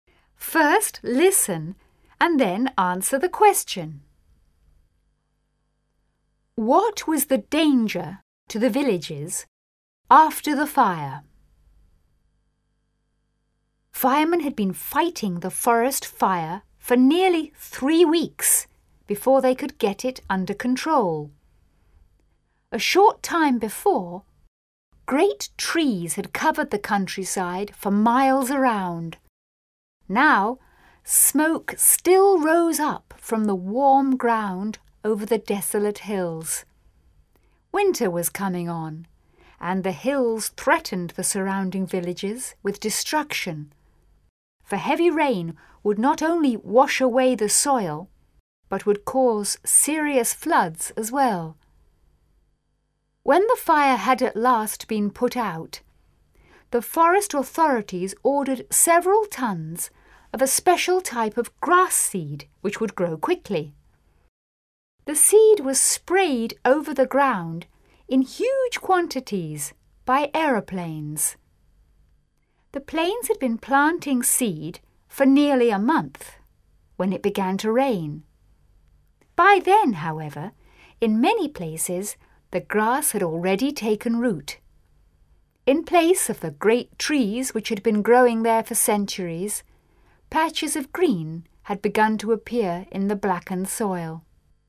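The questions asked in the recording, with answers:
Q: What was the danger to the villages after the fire?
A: Heavy rain could wash away the soil and cause serious floods.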